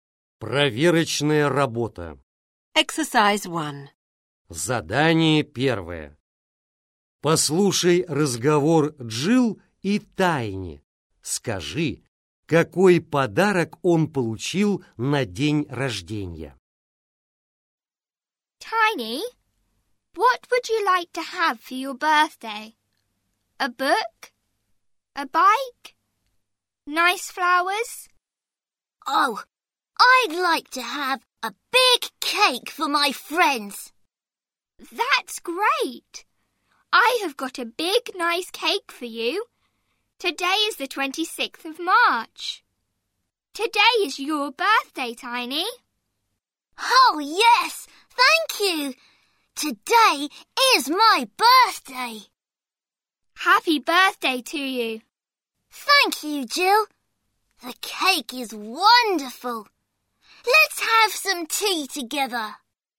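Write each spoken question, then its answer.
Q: Скажи, какой подарок он получил на день рождения?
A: большой торт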